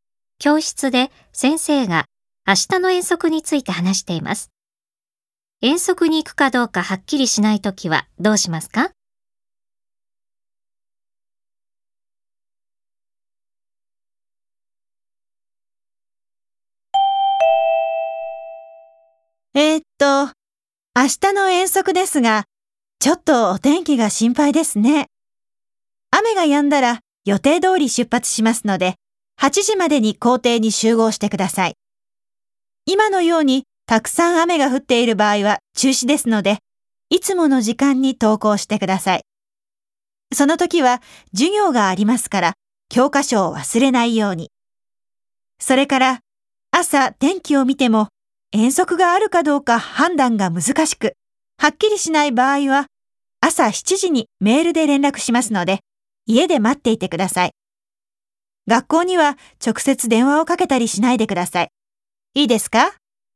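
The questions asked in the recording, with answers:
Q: 遠足に行くかどうかはっきりしないときはどうしますか?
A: 朝7時のメールの連絡を家で待つ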